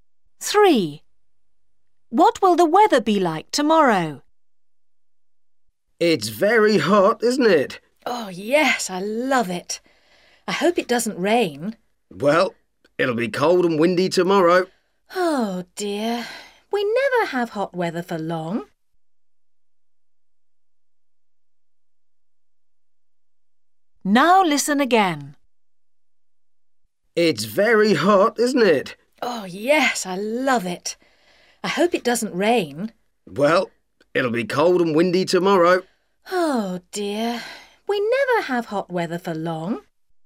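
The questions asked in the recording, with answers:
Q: What will the weather be like tomorrow?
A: cold and windy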